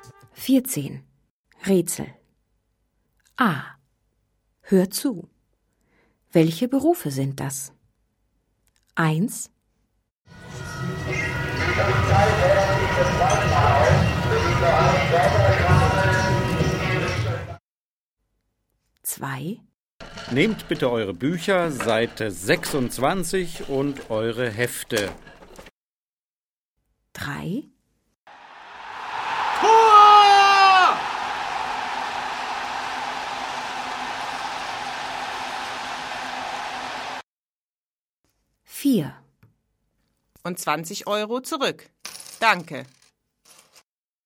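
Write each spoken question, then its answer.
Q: Welche Berufe sind das?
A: Lehrer/Lehrerin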